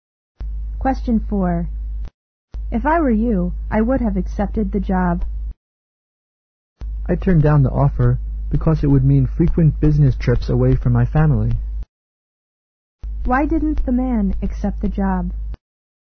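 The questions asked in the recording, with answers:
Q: Why didn't the man accept the job?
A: It would mean frequent business trips away from his family.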